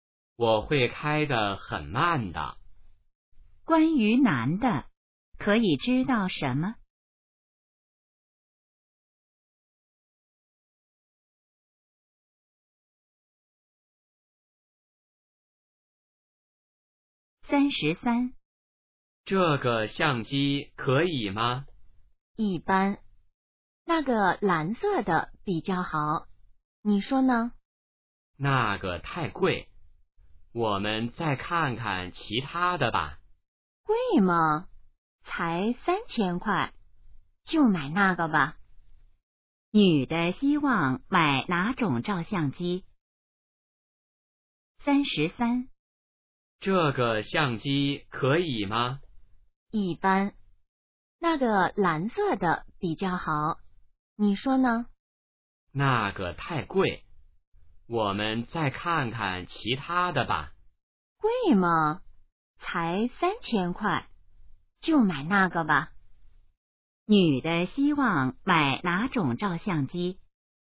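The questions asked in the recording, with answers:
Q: 女的希望买哪种照相机?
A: 蓝色的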